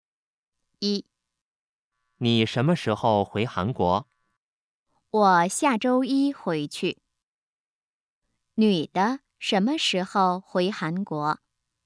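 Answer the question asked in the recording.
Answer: 下周一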